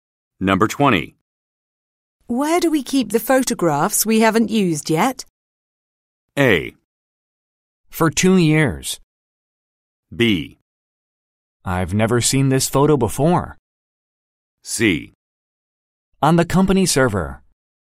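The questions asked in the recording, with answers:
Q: Where do we keep the photographs we haven't used yet?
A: C: On the company server.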